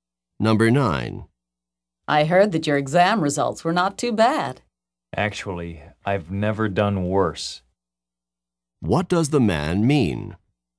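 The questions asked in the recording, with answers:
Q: What does the man mean?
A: His exam results were the worst ever.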